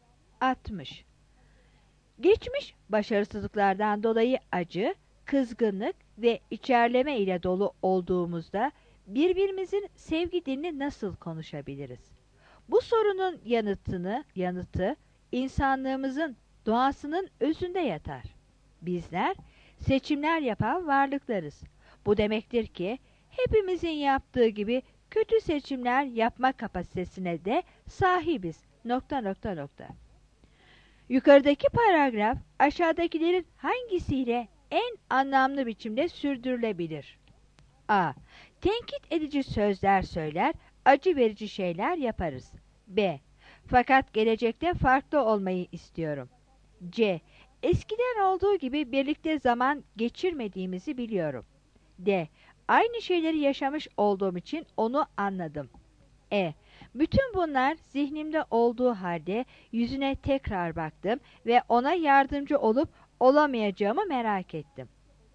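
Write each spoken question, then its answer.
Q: Yukarıdaki paragraf aşağıdakilerin hangisiyle en anlamlı biçimde sürdürülebilir?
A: A: Tenkit edici sözler söyler, acı verici şeyler yaparız.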